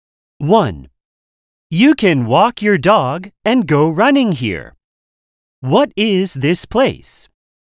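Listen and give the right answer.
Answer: a park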